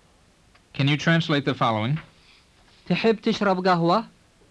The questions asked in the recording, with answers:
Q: Can you translate the following? تحب تشرب قهوة؟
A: It means, would you like to drink coffee?